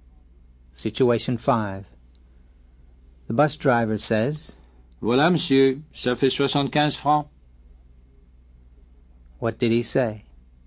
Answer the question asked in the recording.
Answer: There you are, sir. It comes to 75 francs.